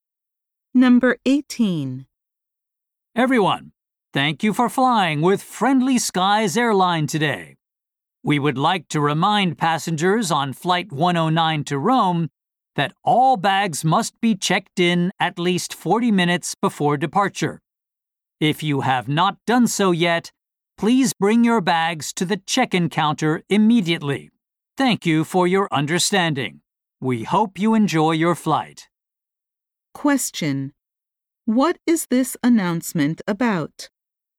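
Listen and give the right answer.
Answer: Bags for flight 109 must be checked in at least 40 minutes before departure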